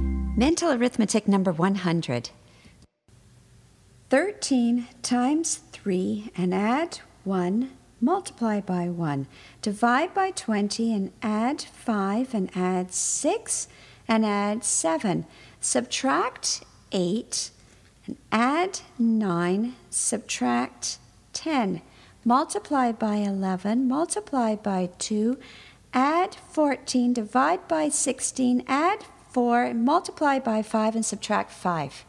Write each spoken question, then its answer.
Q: Multiply by 11, multiply by 2, add 14, divide by 16, add 4, multiply by 5, and subtract 5.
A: And the answer is 95.